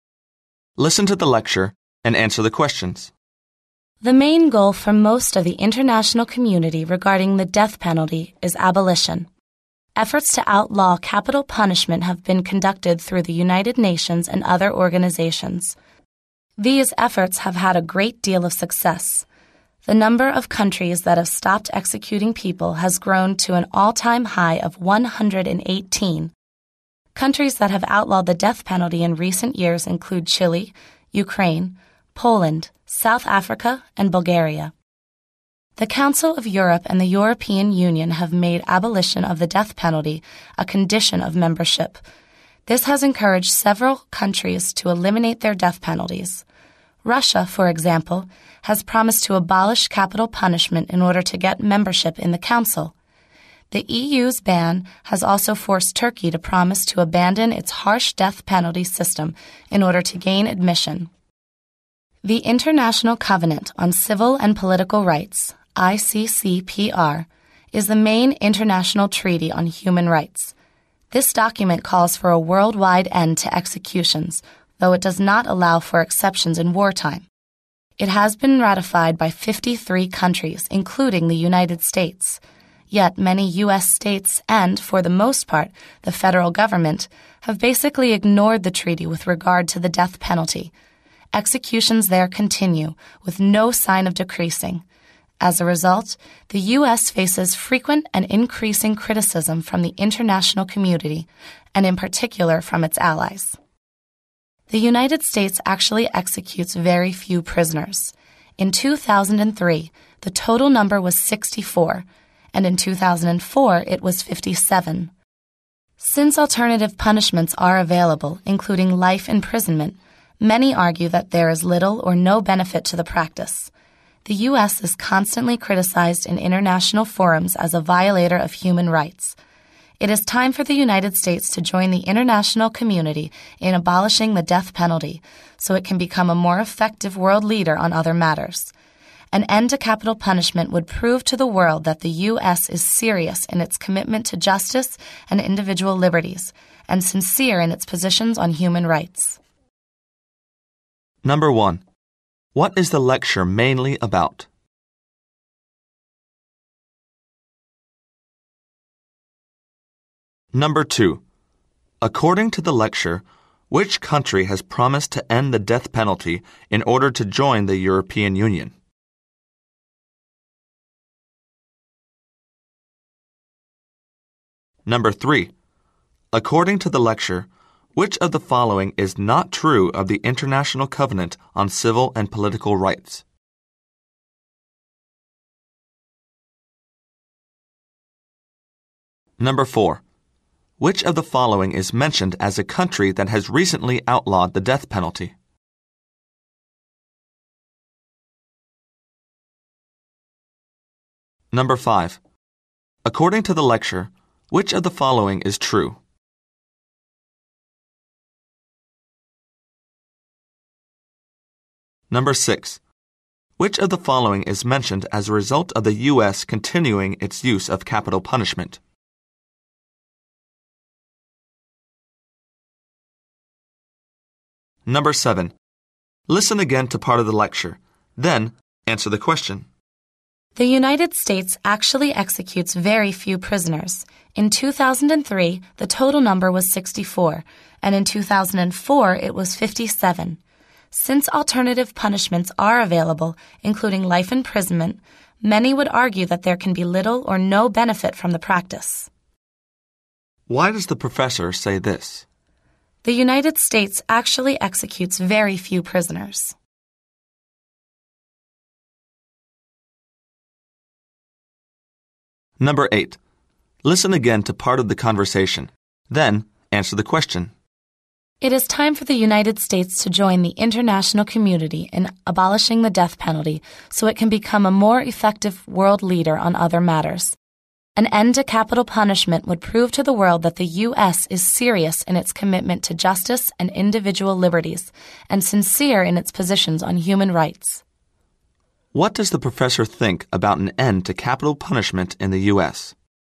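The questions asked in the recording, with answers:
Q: What is the lecture mainly about?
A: International efforts to abolish the death penalty, and why the U.S. should abolish it too

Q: According to the lecture, which country has promised to end the death penalty in order to join the European Union?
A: Turkey

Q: Which of the following is mentioned as a result of the U.S. continuing its use of capital punishment?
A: The U.S. faces frequent and increasing criticism from the international community, especially its allies

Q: What does the professor think about an end to capital punishment in the U.S.?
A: It would show the world the U.S. is serious about justice, individual liberties and human rights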